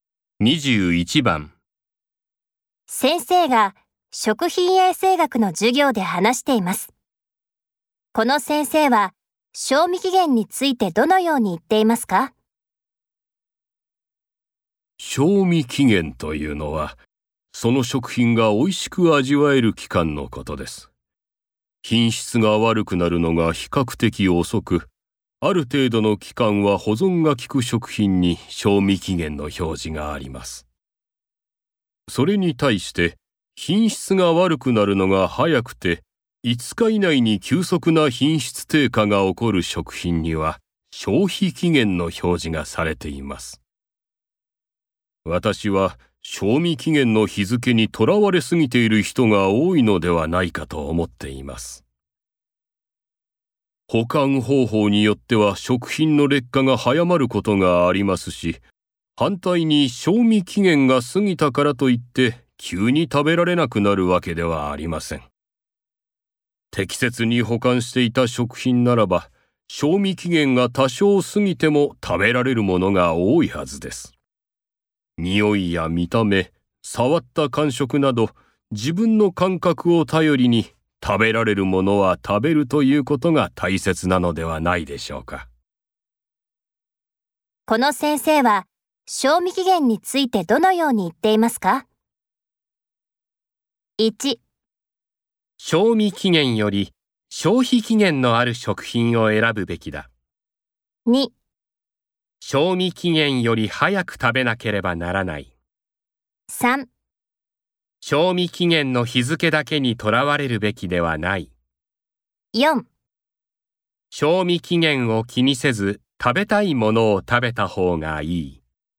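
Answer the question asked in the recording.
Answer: 3: 賞味期限の日付だけにとらわれるべきではない。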